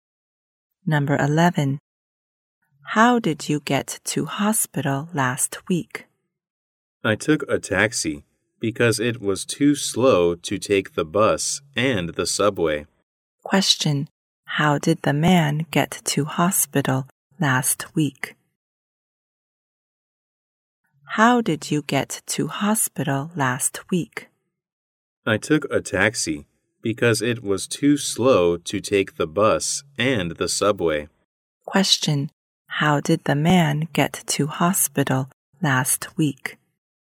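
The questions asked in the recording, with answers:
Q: How did the man get to hospital last week?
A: By taxi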